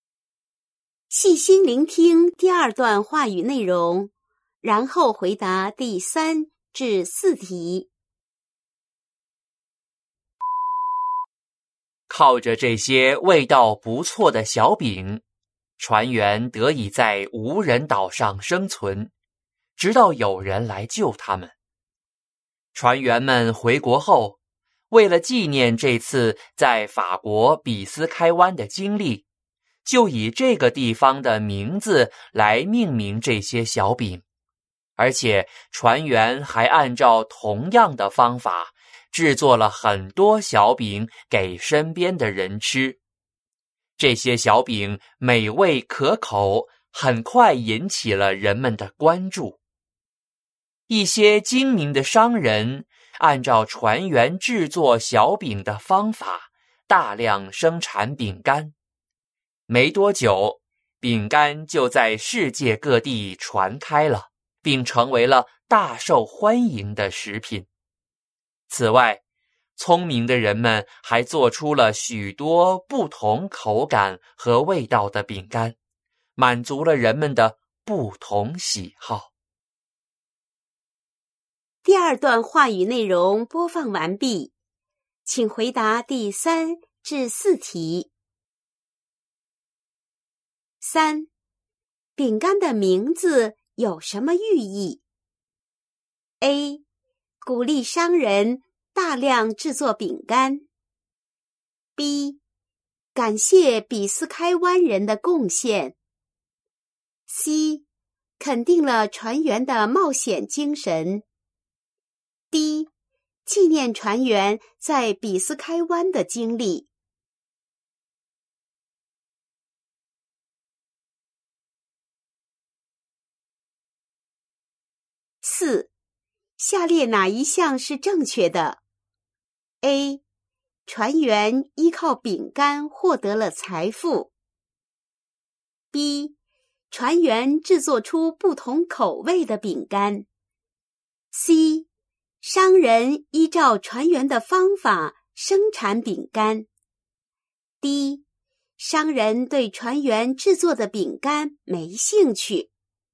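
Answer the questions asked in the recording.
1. D: 纪念船员在比斯开湾的经历。
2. C: 商人依照船员的方法生产饼干。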